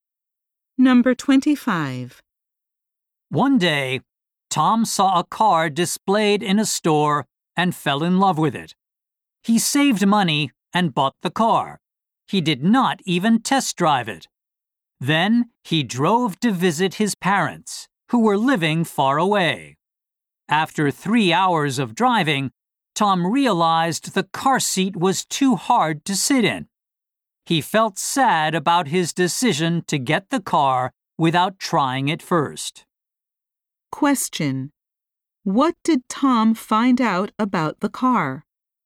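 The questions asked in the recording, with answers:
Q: What did Tom find out about the car?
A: The seat was too hard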